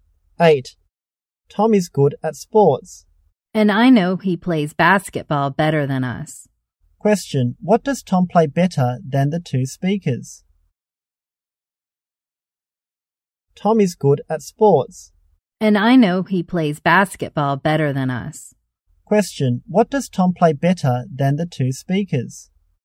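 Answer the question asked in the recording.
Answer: Basketball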